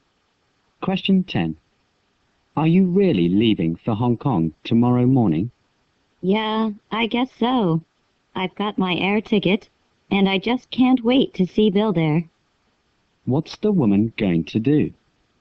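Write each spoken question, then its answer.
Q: What's the woman going to do?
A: Fly to Hong Kong tomorrow morning to see Bill.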